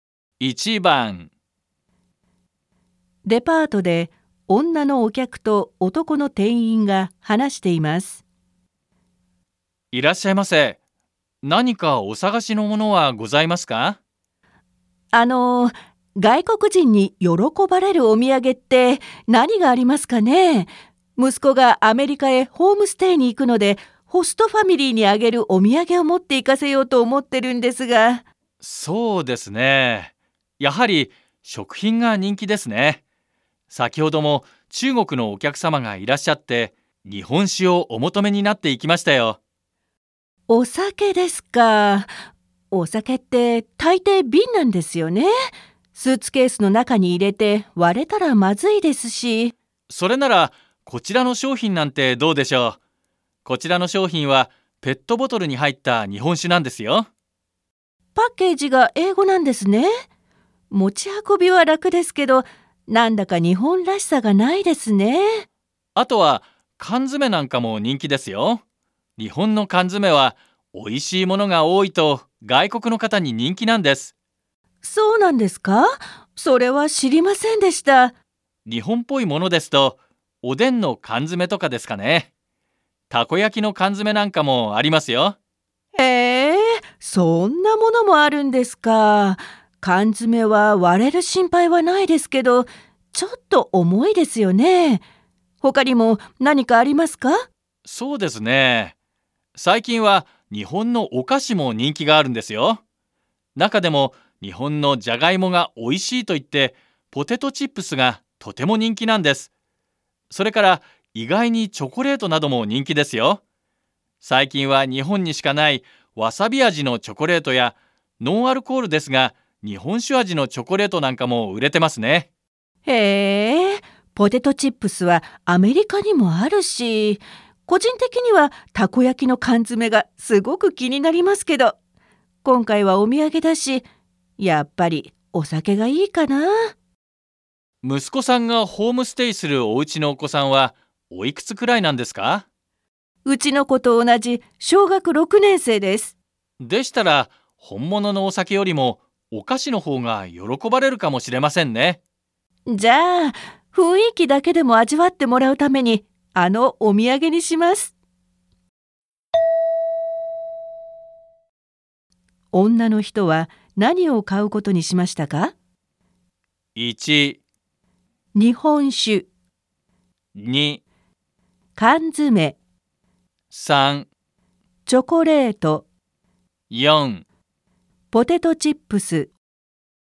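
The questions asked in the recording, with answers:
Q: 女の人は何を買うことにしましたか?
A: 3: チョコレート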